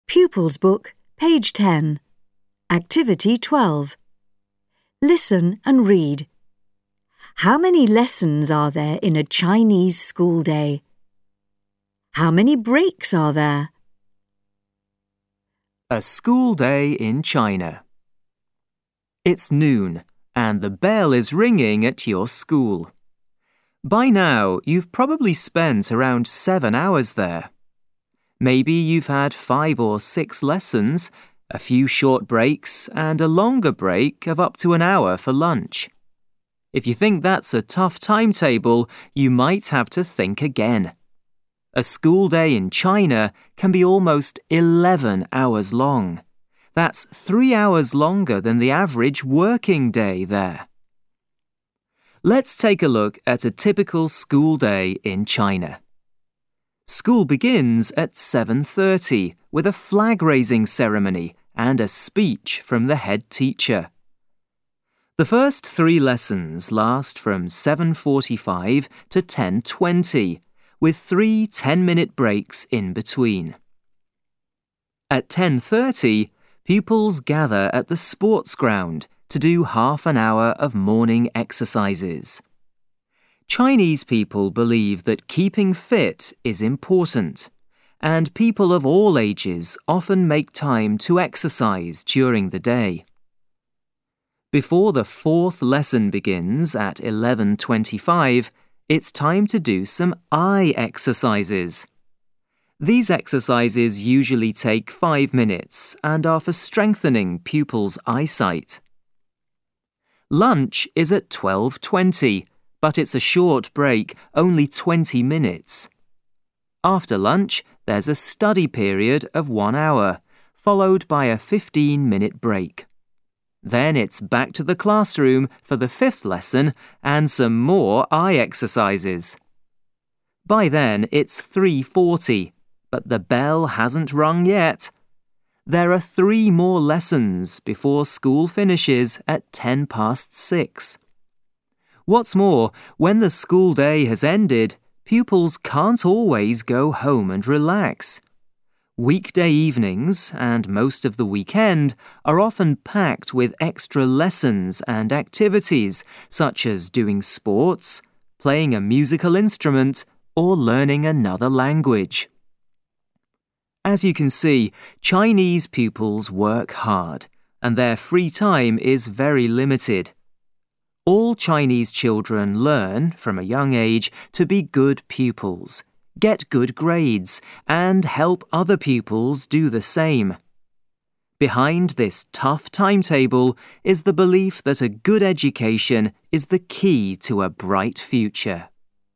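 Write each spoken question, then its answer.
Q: How many lessons are there in a Chinese school day?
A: Eight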